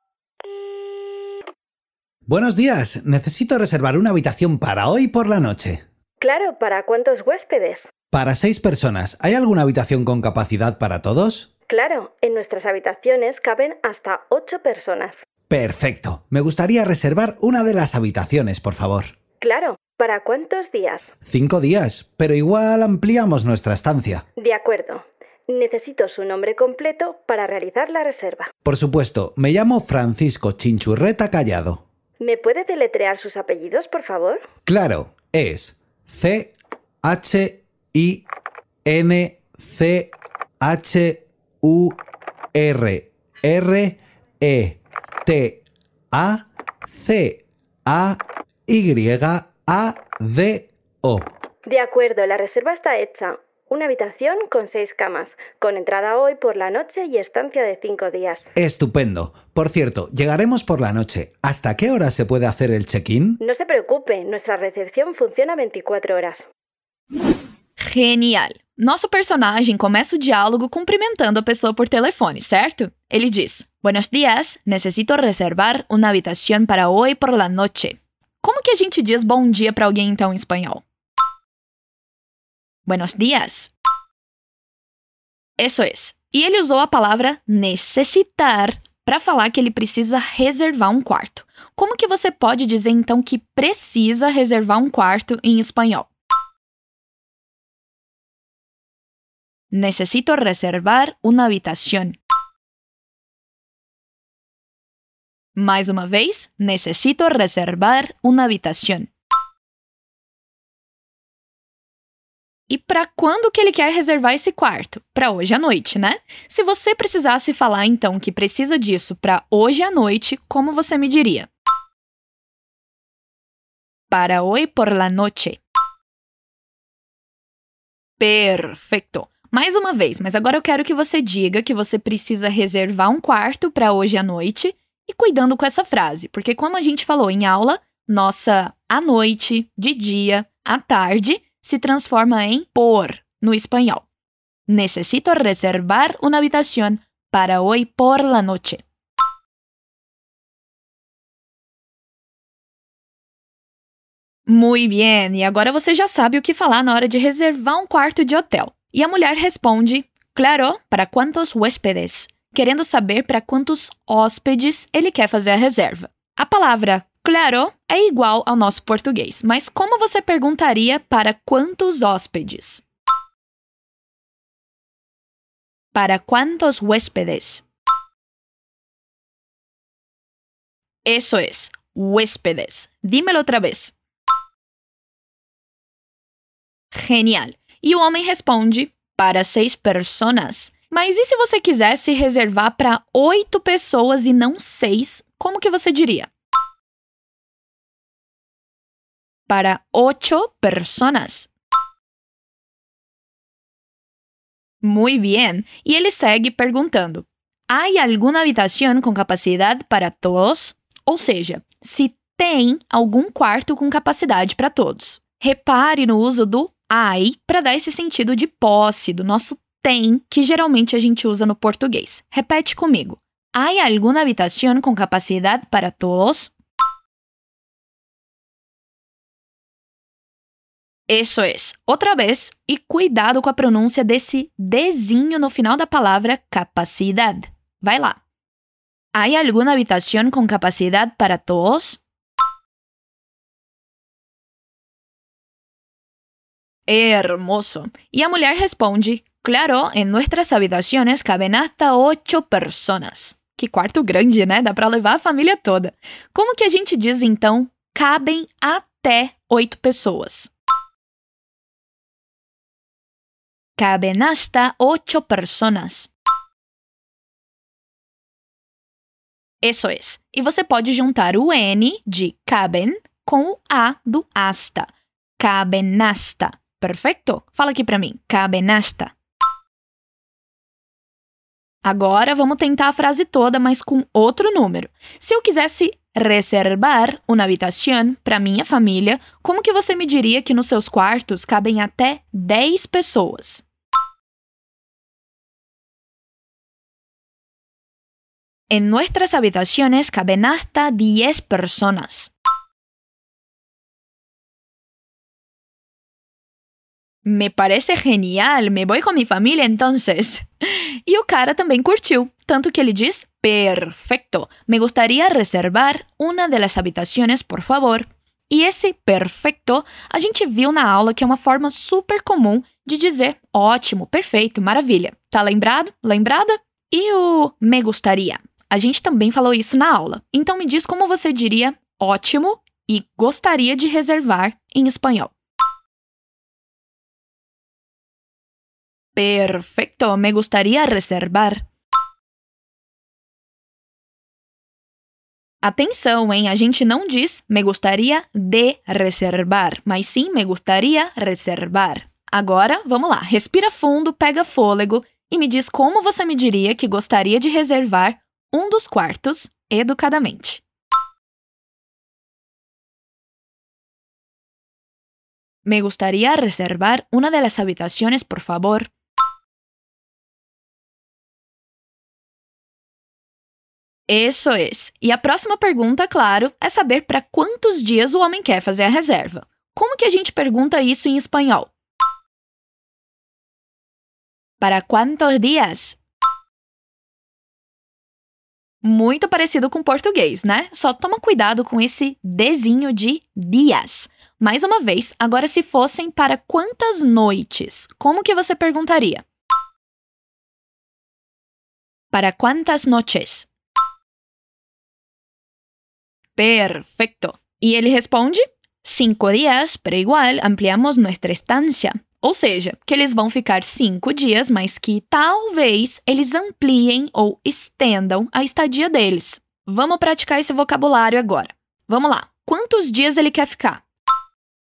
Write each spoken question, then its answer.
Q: Quantos dias ele quer ficar?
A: 5 dias.